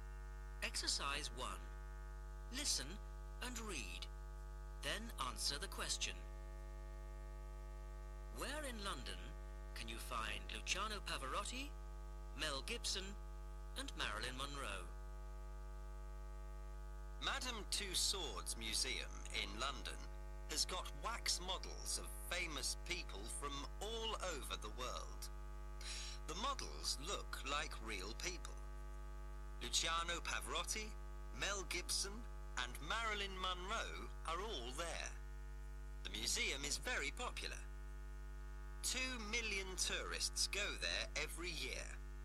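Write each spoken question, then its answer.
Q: Where in London can you find Luciano Pavarotti, Mel Gibson, and Marilyn Monroe?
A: At Madame Tussauds Museum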